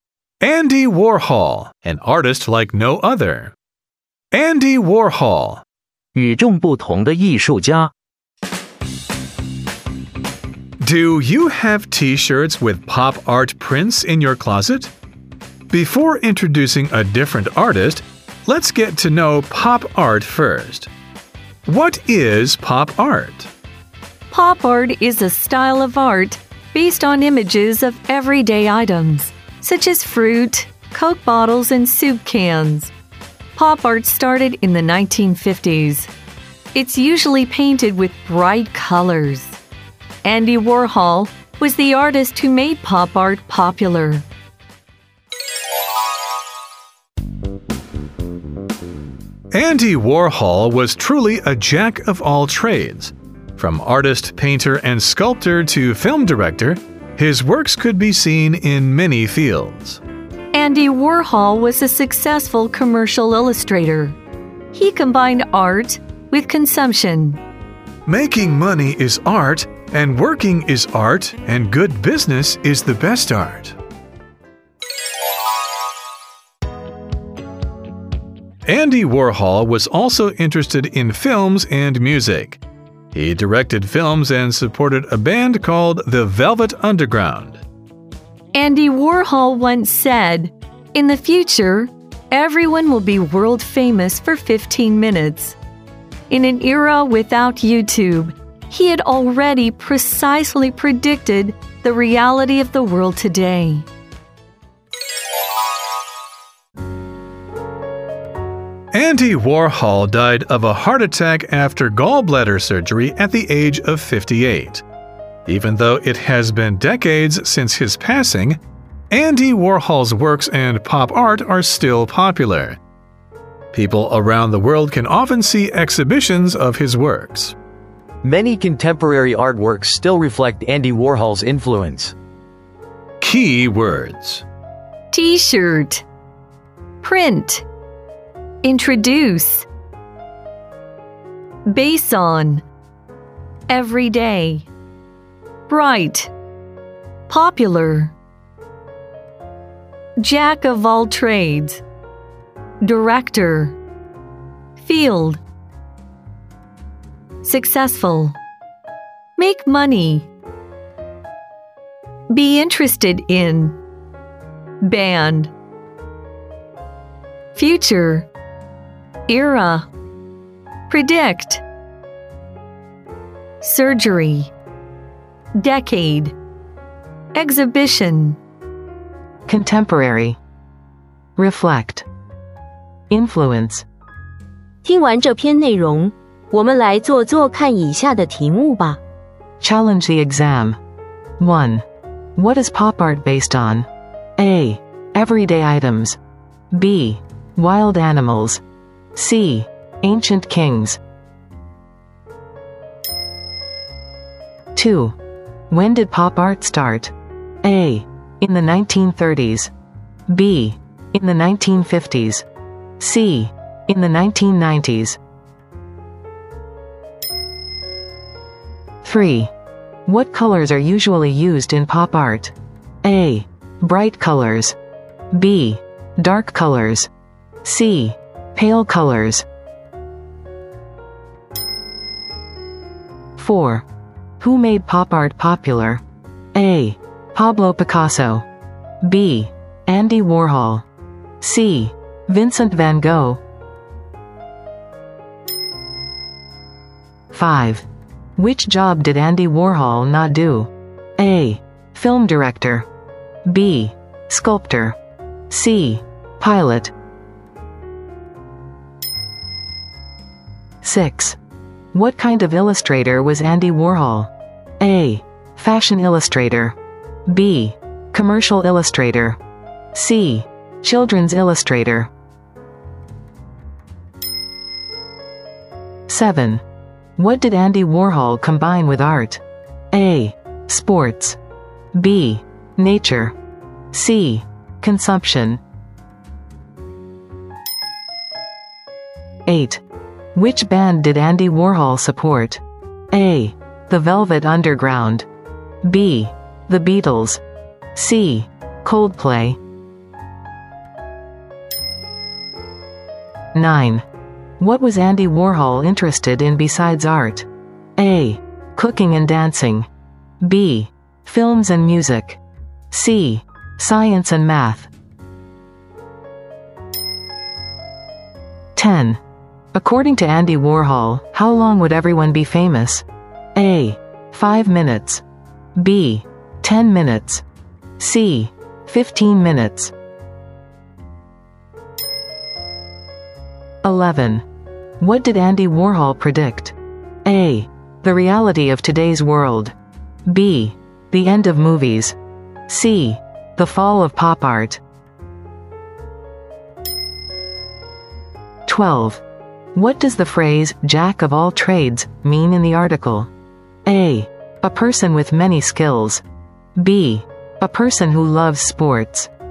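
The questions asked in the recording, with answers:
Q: What is pop art based on?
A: A: Everyday items

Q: When did pop art start?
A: B: In the 1950s

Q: What colors are usually used in pop art?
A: A: Bright colors

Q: Who made pop art popular?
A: B: Andy Warhol

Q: Which job did Andy Warhol not do?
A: C: Pilot

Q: What kind of illustrator was Andy Warhol?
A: B: Commercial illustrator

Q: What did Andy Warhol combine with art?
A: C: Consumption

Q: What was Andy Warhol interested in besides art?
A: B: Films and music

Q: According to Andy Warhol, how long would everyone be famous?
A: C: 15 minutes

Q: What did Andy Warhol predict?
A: A: The reality of today's world

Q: What does the phrase "jack of all trades" mean in the article?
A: A: A person with many skills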